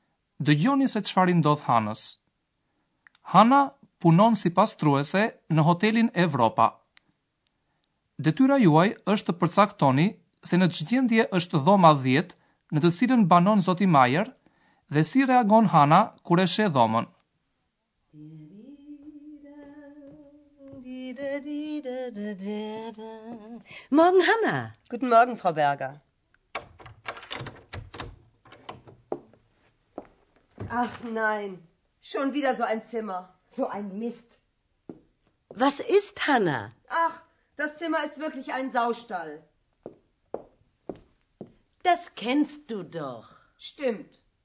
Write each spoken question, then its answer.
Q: Detyra juaj është të përcaktoni se në çgjendje është dhoma 10 në të cilën banon zoti Majer.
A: Hana mendon se dhoma duket si stall derrash.

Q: Dhe si reagon Hana kur e sheh dhomën?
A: Kjo e zëmbron atë dhe e bën që të shajë.